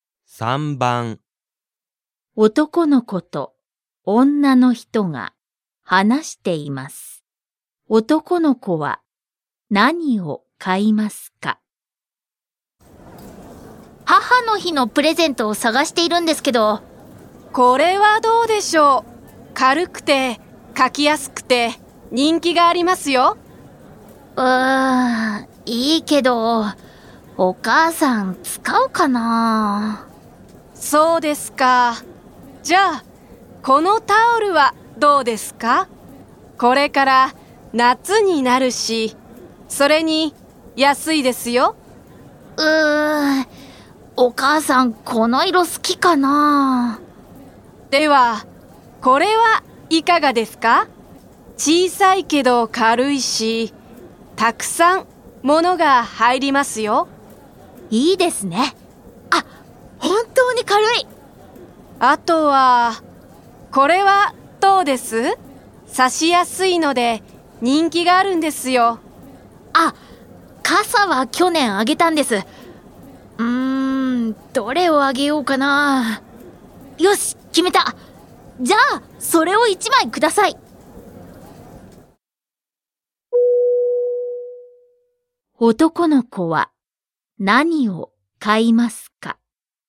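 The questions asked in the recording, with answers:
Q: 男の子は何を買いますか?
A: タオル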